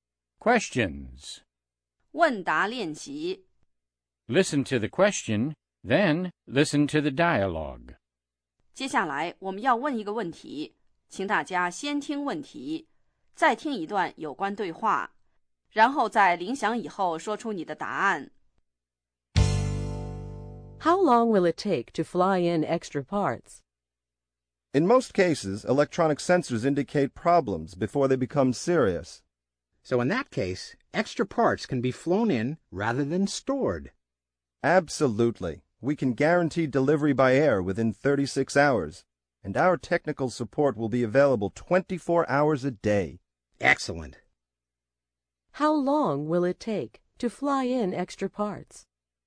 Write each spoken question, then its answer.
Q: How long will it take to fly in extra parts?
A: It will take 36 hours or less.